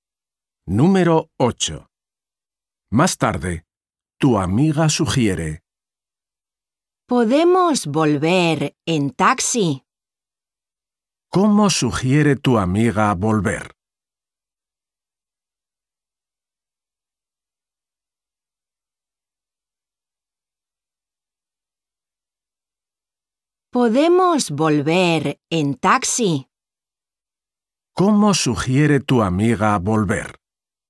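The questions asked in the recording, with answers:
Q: ¿Cómo sugiere tu amiga volver?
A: en taxi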